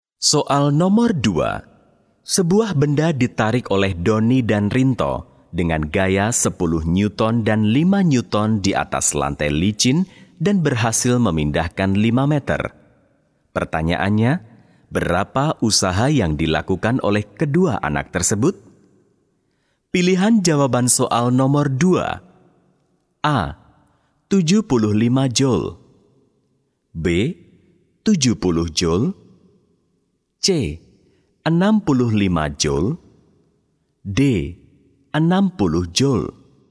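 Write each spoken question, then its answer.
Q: Pertanyaannya, berapa usaha yang dilakukan oleh kedua anak tersebut?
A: A: 75 joule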